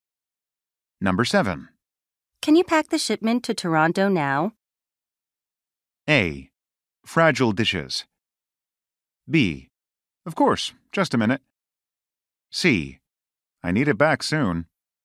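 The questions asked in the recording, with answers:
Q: Can you pack the shipment to Toronto now?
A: B: Of course, just a minute.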